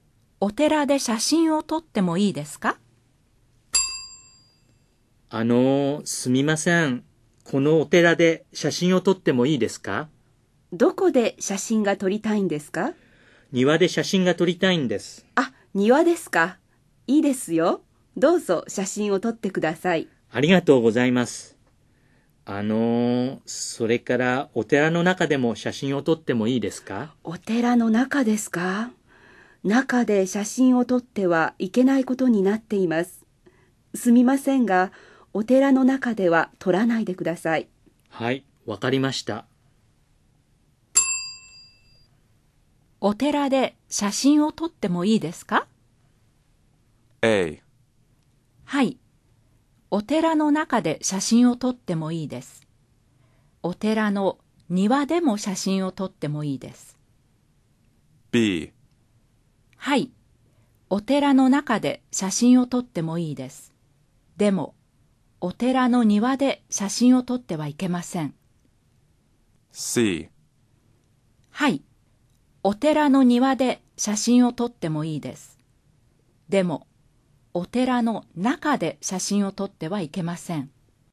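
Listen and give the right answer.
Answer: C: はい、お寺の庭で写真を撮ってもいいです。でも、お寺の中で写真を撮ってはいけません。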